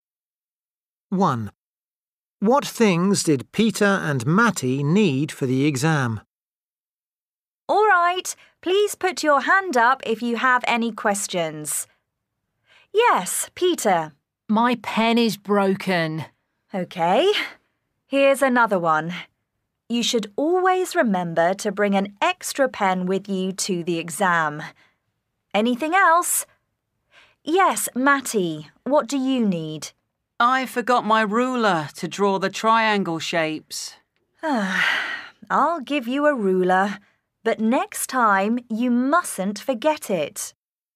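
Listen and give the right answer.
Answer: A pen and a ruler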